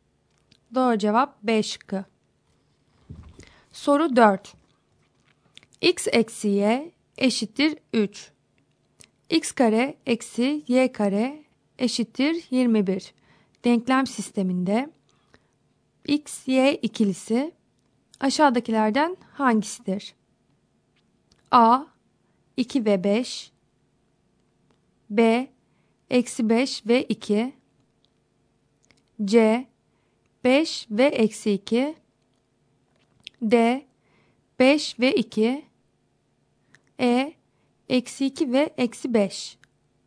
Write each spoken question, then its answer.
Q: Denklem sisteminde X, Y ikilisi aşağıdakilerden hangisidir?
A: Doğru cevap D şıkkı.